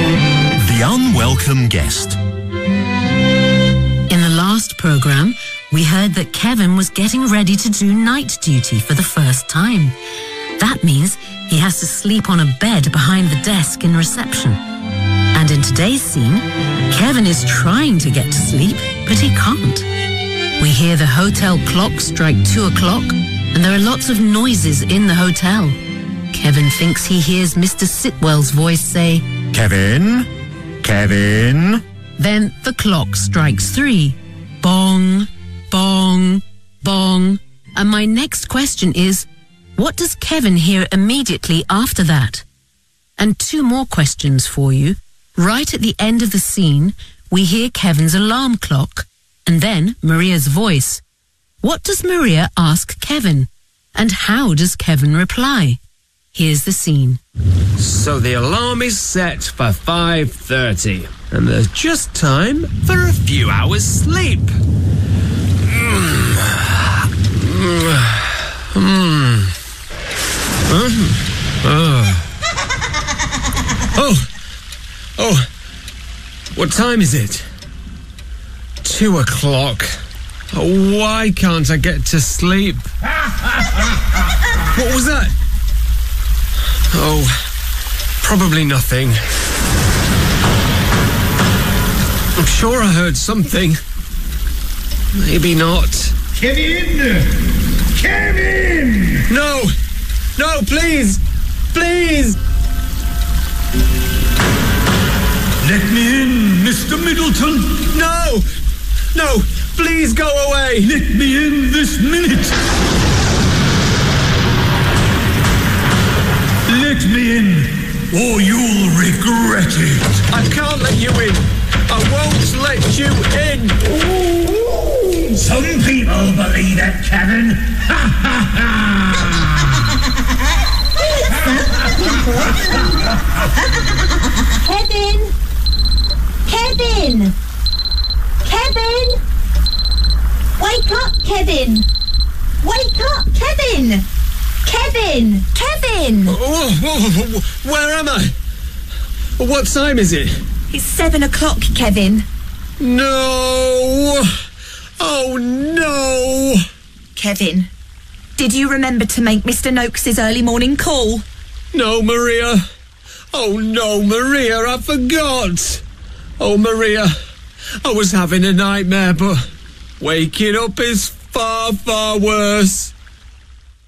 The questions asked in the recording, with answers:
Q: And my next question is, what does Kevin hear immediately after that?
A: Let me in, Mr. Middleton.

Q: What does Maria ask Kevin?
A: Noakes' early morning call?

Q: And how does Kevin reply?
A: Oh no, Maria. I forgot. Maria, I was having a nightmare.